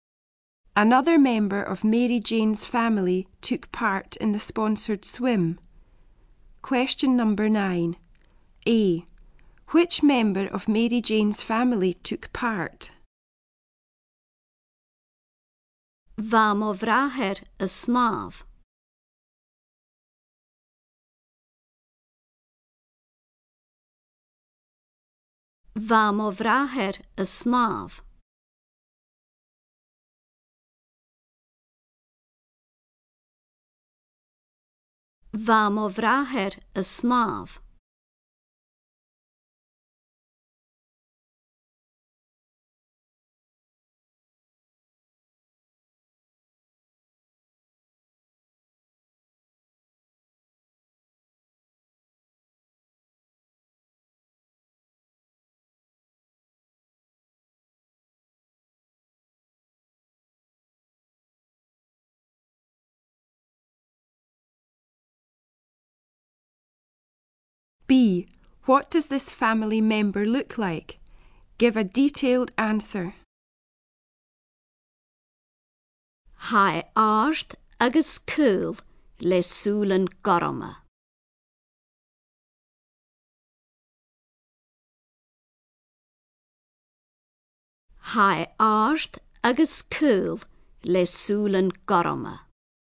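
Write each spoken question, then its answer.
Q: Which member of Mary Jane's family took part?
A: Her brother

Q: What does this family member look like?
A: Tall and thin with blue eyes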